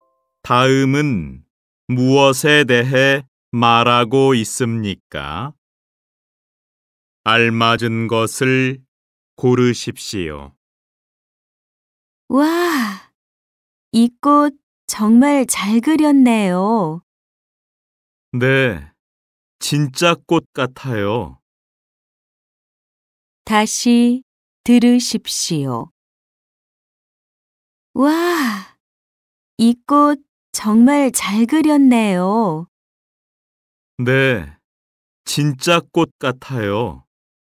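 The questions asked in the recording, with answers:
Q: 다음은 무엇에 대해 말하고 있습니까?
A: 그림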